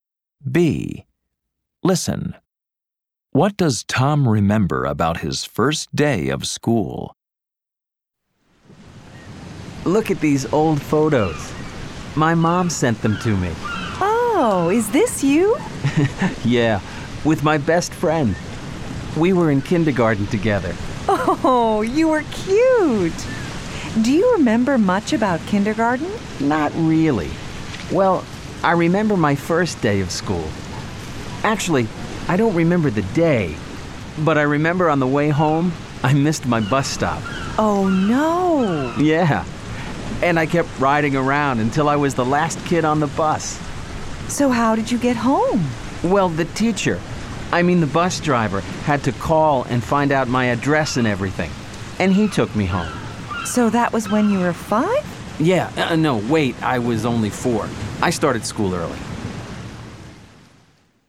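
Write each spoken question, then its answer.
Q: What does Tom remember about his first day of school?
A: He missed his bus stop on the way home and the bus driver took him home.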